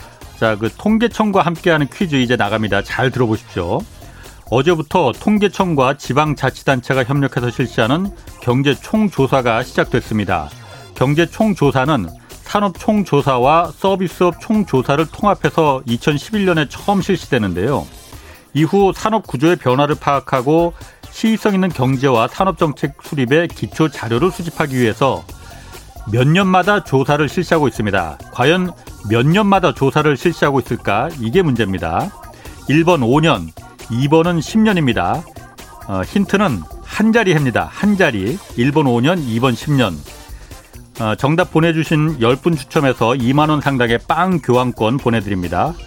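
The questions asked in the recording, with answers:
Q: 과연 몇 년마다 조사를 실시하고 있을까?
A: 1번: 5년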